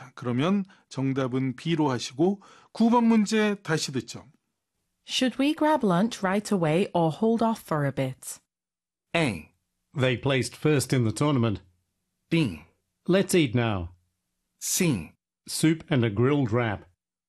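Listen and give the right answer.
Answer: B: Let's eat now.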